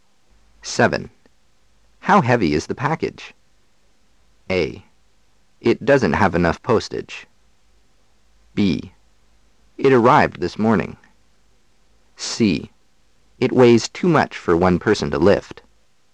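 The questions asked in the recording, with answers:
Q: How heavy is the package?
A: C: It weighs too much for one person to lift.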